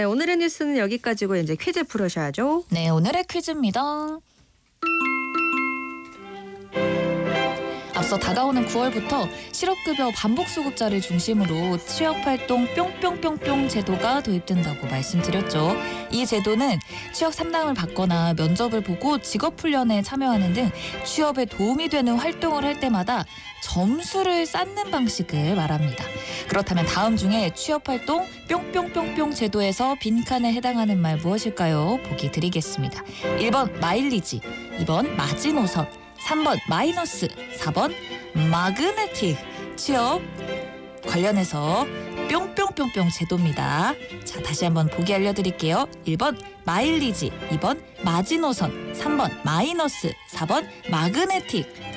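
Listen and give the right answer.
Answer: 1번: 마일리지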